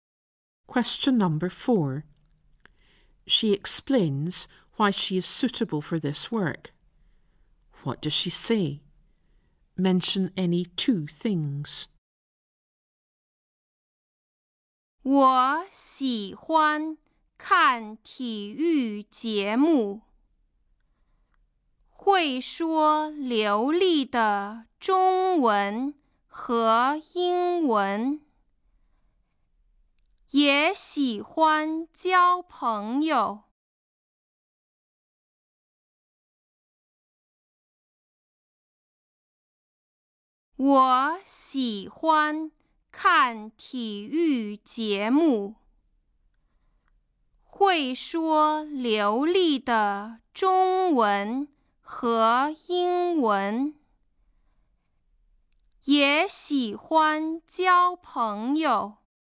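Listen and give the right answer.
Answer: Any two: she likes watching sports programmes; she speaks fluent Chinese and English; she likes making friends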